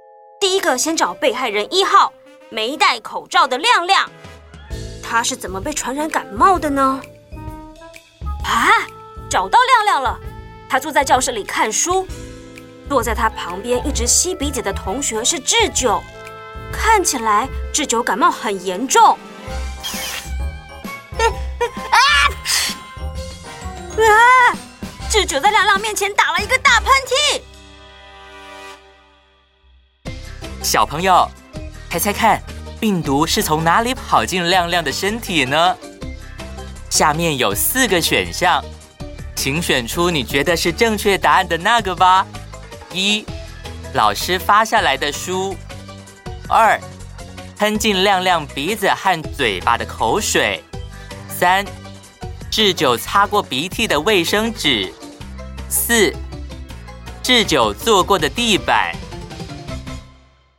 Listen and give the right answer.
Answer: 答案是二,喷进亮亮鼻子和嘴巴的口水。